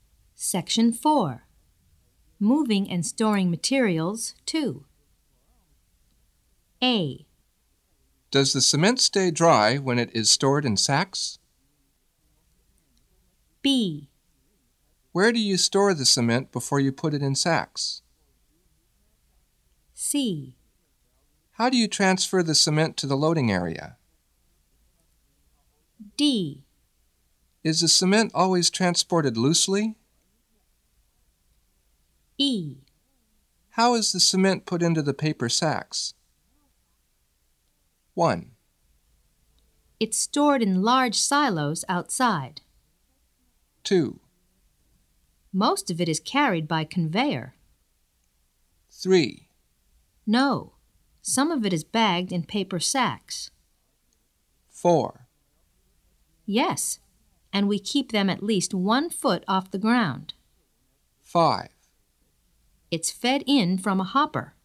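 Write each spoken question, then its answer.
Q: It's stored in large silos outside.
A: B: Where do you store the cement before you put it in sacks?

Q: Most of it is carried by conveyor.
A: C: How do you transfer the cement to the loading area?

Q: No, some of it is bagged in paper sacks.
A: D: Is the cement always transported loosely?

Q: Yes, and we keep them at least 1 foot off the ground.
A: A: Does the cement stay dry when it is stored in sacks?

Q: It's fed in from a hopper.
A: E: How is the cement put into the paper sacks?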